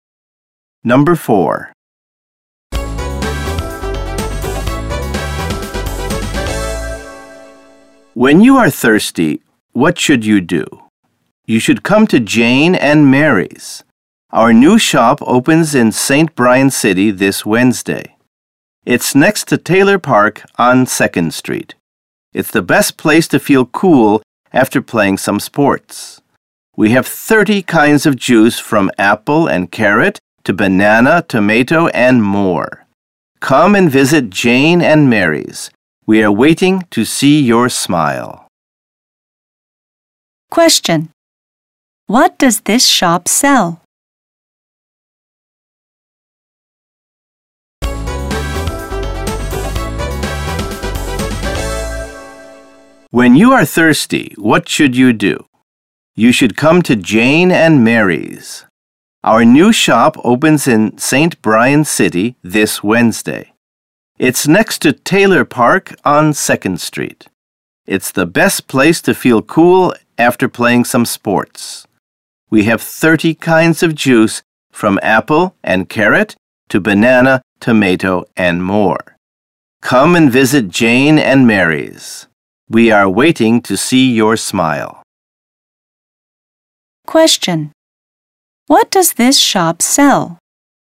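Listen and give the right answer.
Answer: Juice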